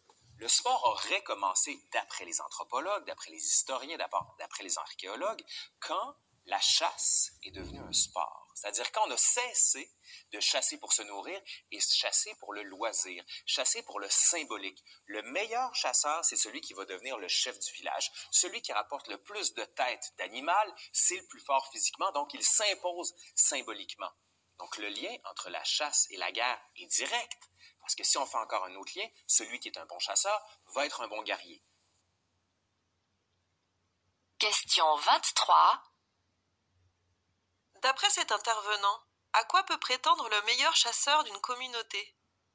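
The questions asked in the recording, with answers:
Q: D'après cet intervenant, à quoi peut prétendre le meilleur chasseur d'une communauté?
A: À devenir le chef du village.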